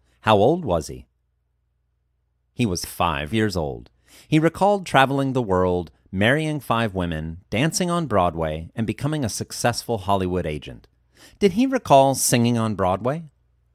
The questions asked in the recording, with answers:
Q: Did he recall singing on Broadway?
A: No, he did not recall singing on Broadway.